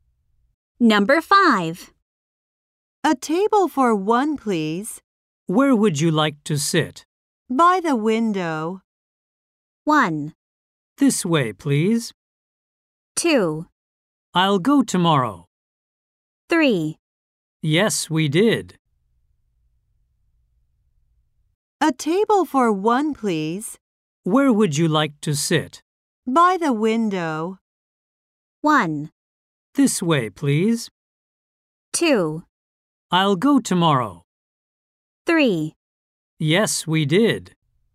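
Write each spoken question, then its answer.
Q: By the window.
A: 1: This way, please.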